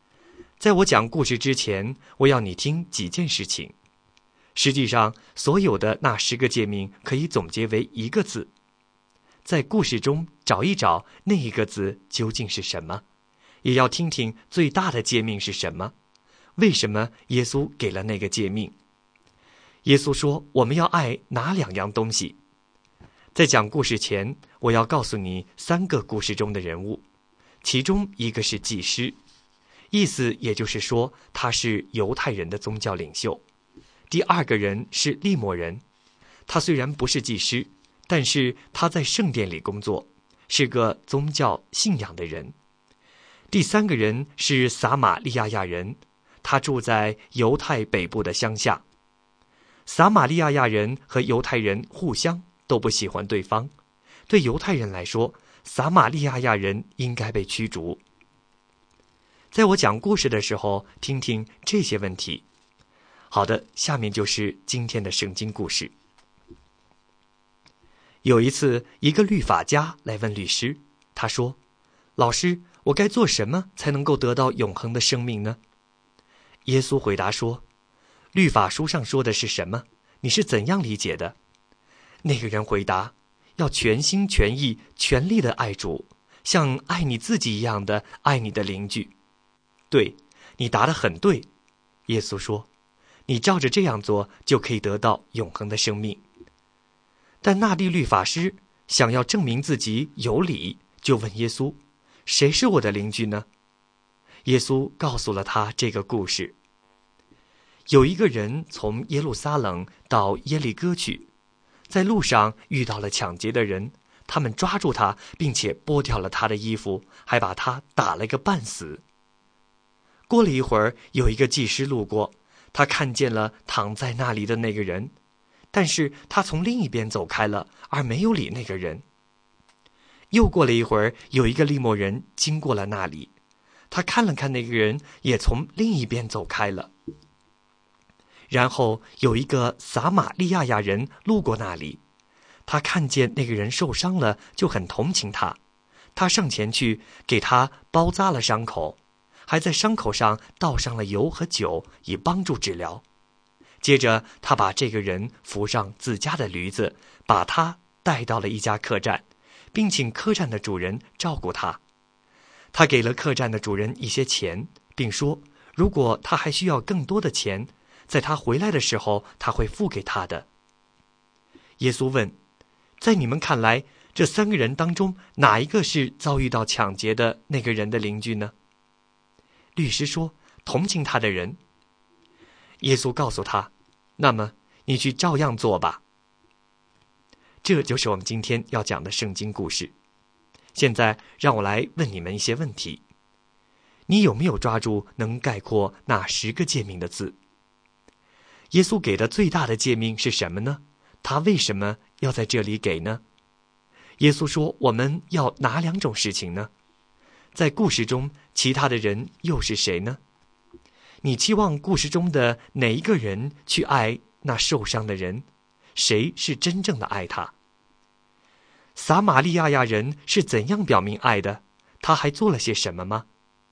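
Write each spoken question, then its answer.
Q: 耶稣给的最大的诫命是什么呢?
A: 全心全意全力地爱主,像爱自己一样爱邻居

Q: 耶稣说我们要哪两种事情呢?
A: 爱神和爱邻居

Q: 在故事中其他的人又是谁呢?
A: 祭司、利未人和撒玛利亚人

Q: 谁是真正的爱他?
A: 撒玛利亚人

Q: 撒玛利亚亚人是怎样表明爱的?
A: 给他包扎伤口,倒上油和酒,用驴把他送到客栈,并付钱请店主照顾他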